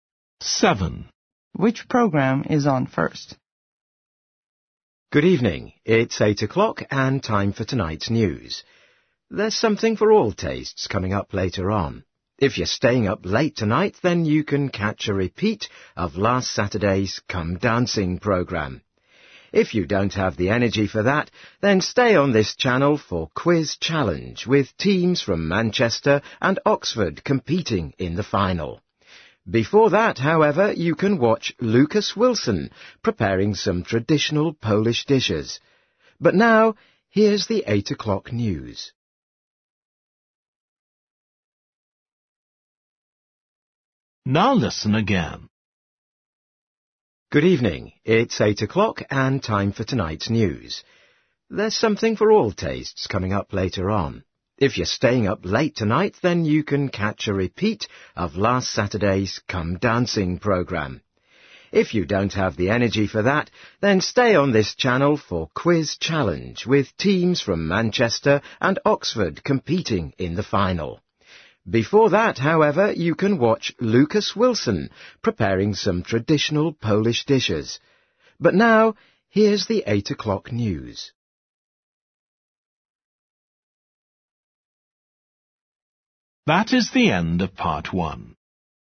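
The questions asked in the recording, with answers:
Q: Which program is on first?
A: the cookery programme (Lucas Wilson cooking Polish dishes)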